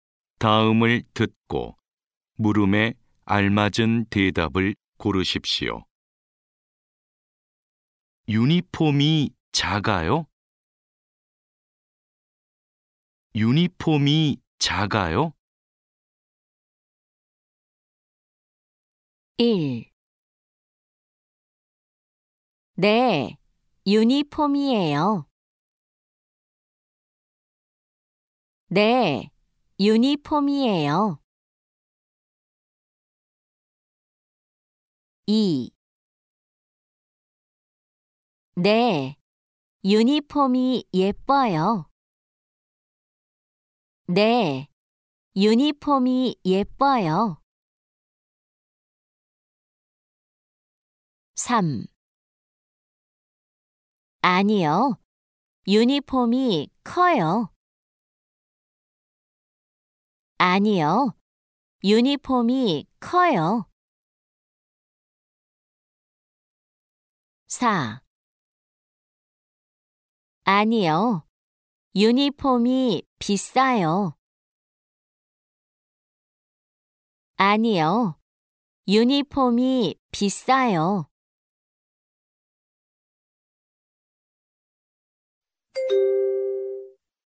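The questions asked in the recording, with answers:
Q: 유니폼이 작아요?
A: 3: 아니요, 유니폼이 커요.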